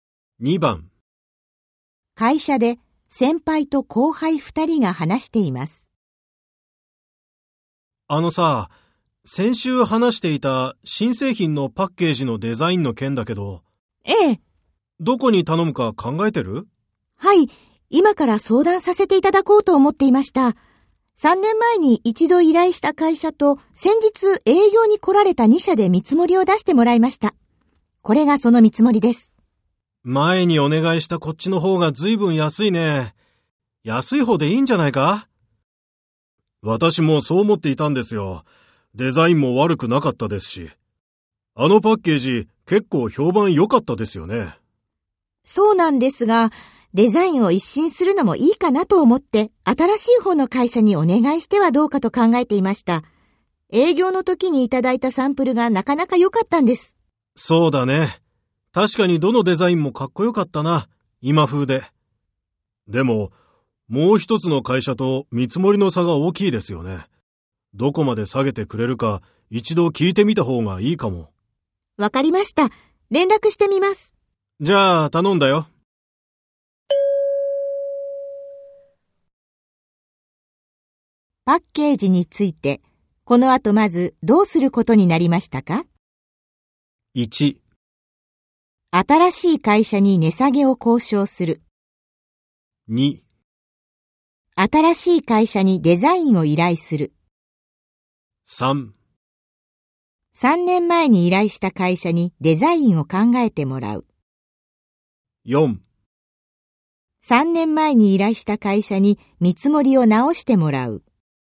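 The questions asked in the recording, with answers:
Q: パッケージについて、この後まずどうすることになりましたか?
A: 1: 新しい会社に値下げを交渉する。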